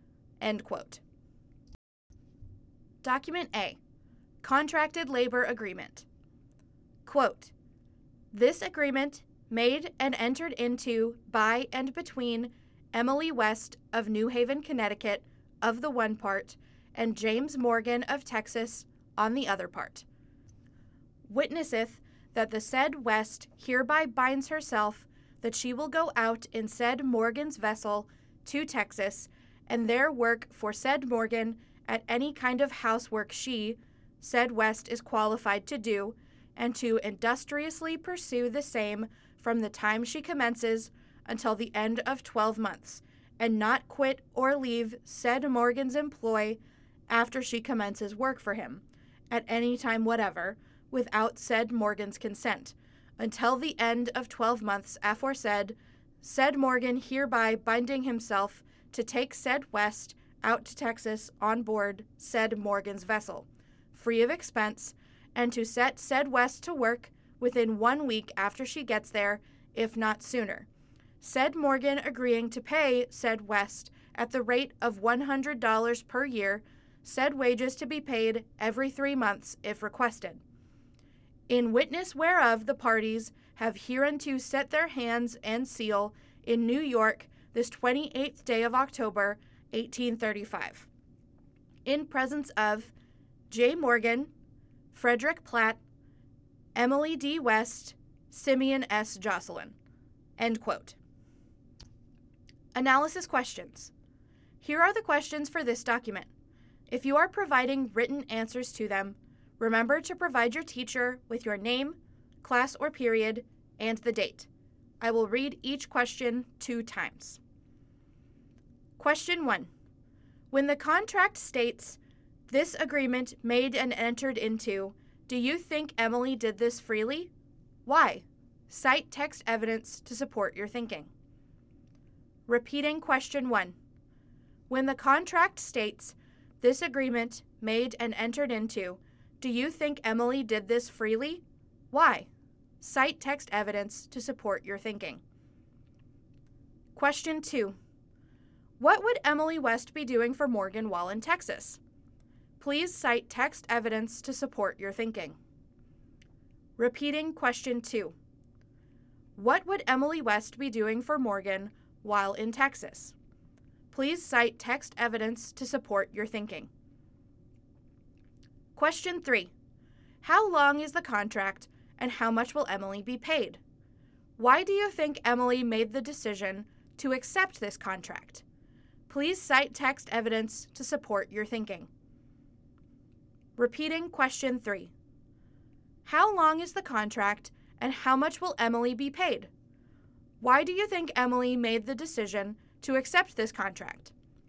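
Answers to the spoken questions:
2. Any kind of housework she is qualified to do
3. 12 months, at $100 per year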